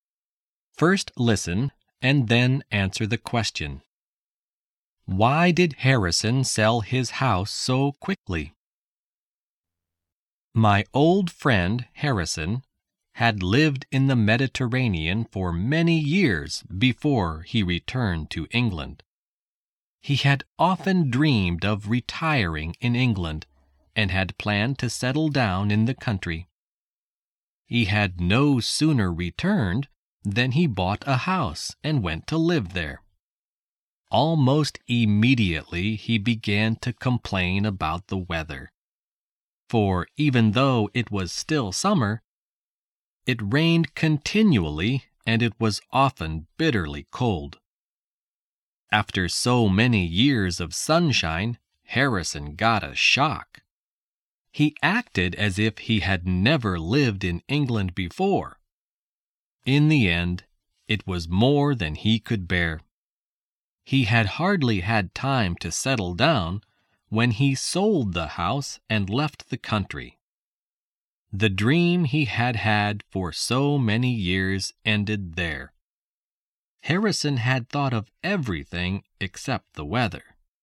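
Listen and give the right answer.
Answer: Because he couldn't bear the English weather: it rained continually and was often bitterly cold.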